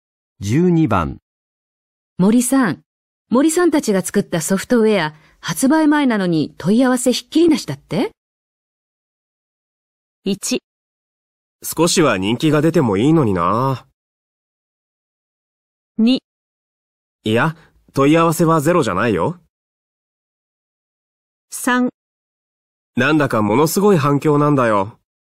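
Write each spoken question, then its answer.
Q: 森さん、森さんたちが作ったソフトウェア、発売前なのに問い合わせひっきりなしだって?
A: 3: なんだかものすごい反響なんだよ。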